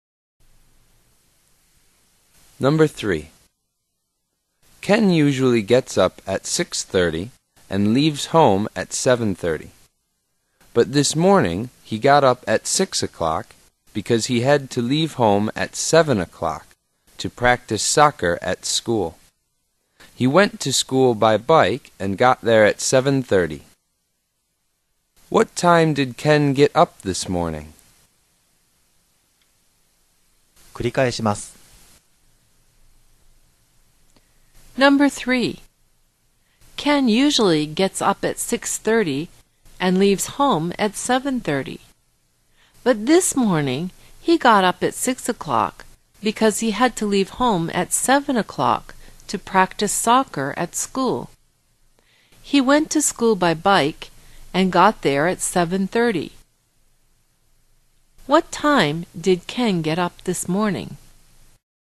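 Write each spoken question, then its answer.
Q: What time did Ken get up this morning?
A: At 6 o'clock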